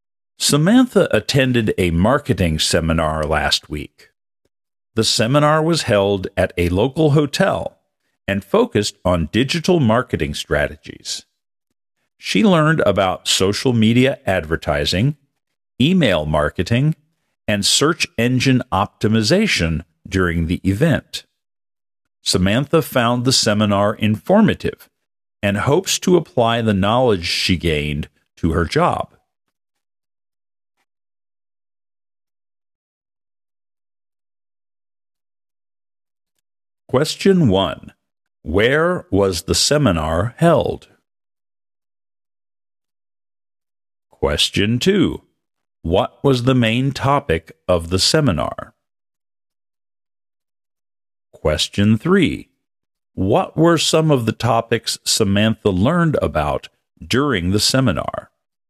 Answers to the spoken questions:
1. It was held at a local hotel.
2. The main topic was digital marketing strategies.
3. She learned about social media advertising, email marketing, and search engine optimization.